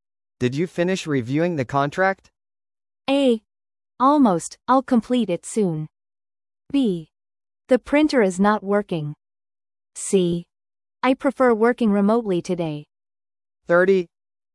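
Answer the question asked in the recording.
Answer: A: Almost, I'll complete it soon.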